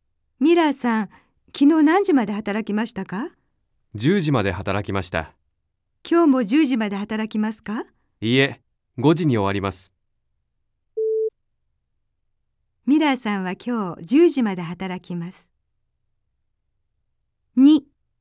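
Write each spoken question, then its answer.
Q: ミラーさんは今日10時まで働きます。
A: ×(今日は5時に終わります)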